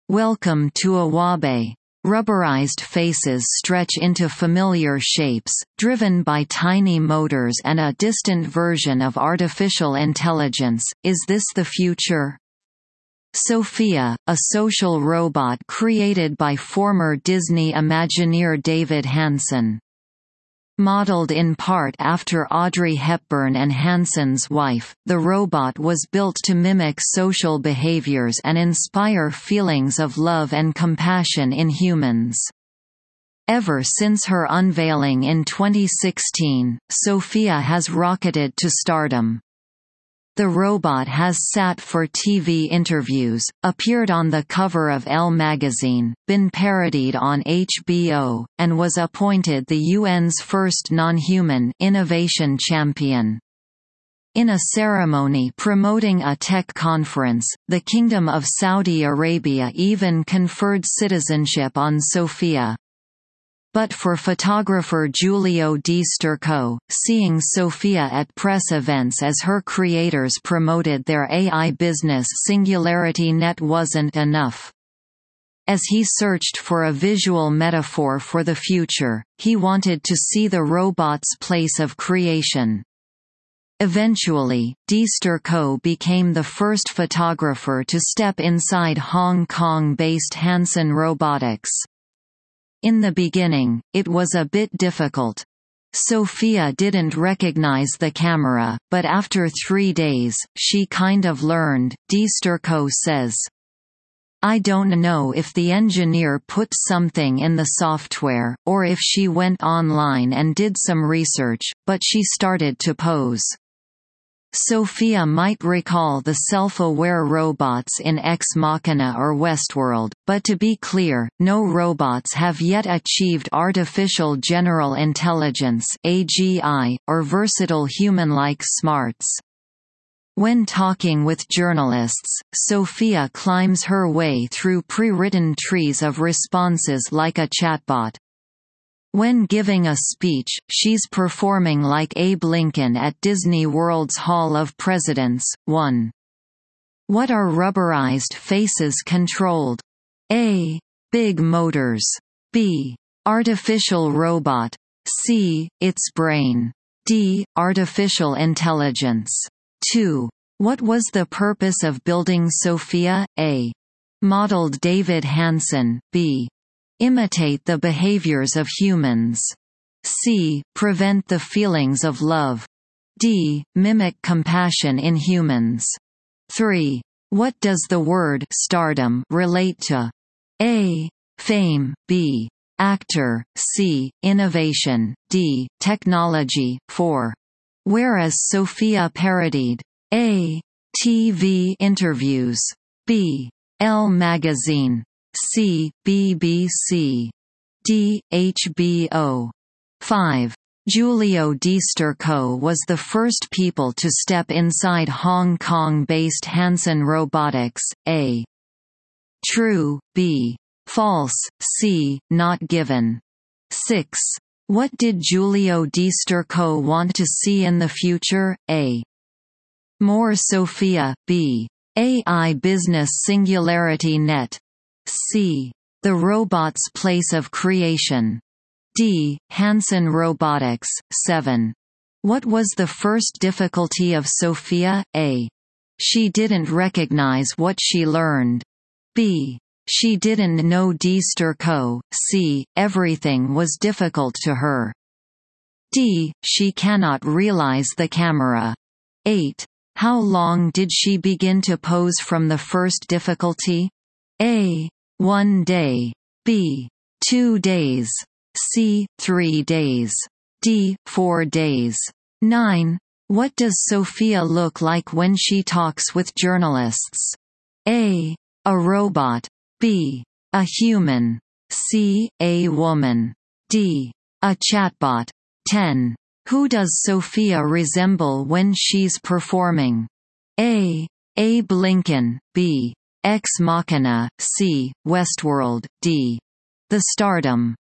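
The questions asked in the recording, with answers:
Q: What are rubberized faces controlled?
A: D: Artificial intelligence.

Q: What was the purpose of building Sophia?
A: B: Imitate the behaviors of humans.

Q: What does the word stardom relate to?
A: A: Fame.

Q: Where is Sophia parodied?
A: D: HBO.

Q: What did Giulio Di Sturco want to see in the future?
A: C: The robot's place of creation.

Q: What was the first difficulty of Sophia?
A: D: She cannot realize the camera.

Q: How long did she begin to pose from the first difficulty?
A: C: 3 days.

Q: What does Sophia look like when she talks with journalists?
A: D: A chatbot.

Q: Who does Sophia resemble when she's performing?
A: A: Abe Lincoln.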